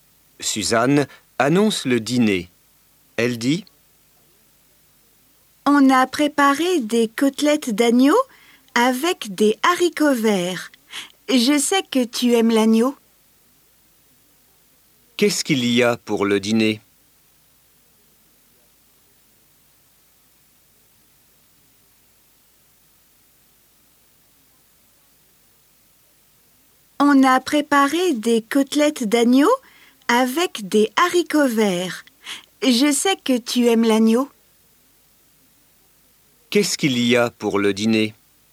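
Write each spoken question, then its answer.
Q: Qu'est-ce qu'il y a pour le dîner?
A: Des côtelettes d'agneau avec des haricots verts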